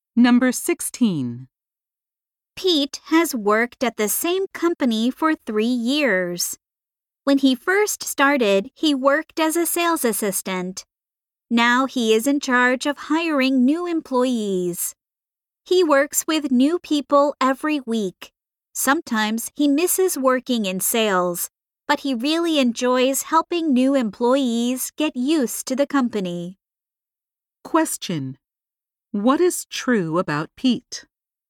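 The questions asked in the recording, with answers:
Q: What is true about Pete?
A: He is in charge of hiring new employees.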